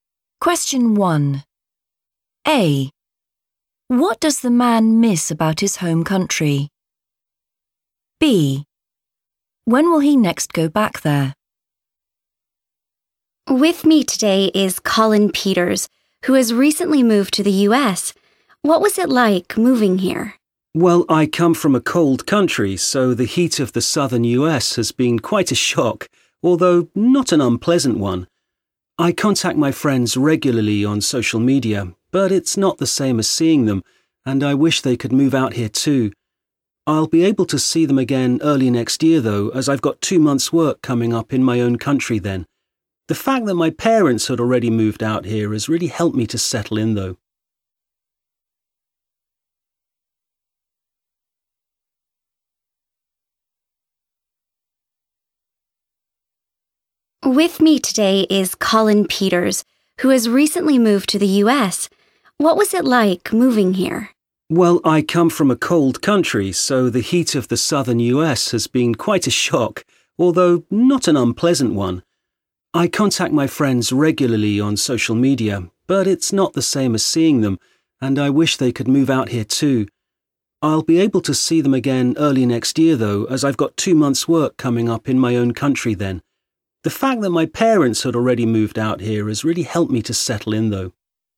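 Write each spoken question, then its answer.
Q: What does the man miss about his home country?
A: his friends

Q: When will he next go back there?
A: early next year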